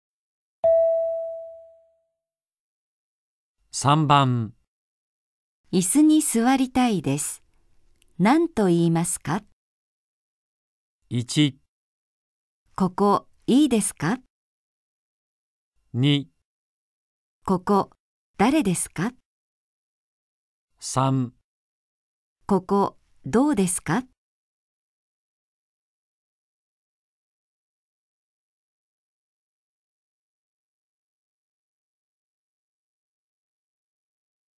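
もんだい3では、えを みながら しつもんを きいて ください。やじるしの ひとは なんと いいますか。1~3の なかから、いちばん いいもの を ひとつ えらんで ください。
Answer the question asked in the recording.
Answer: ここいいですか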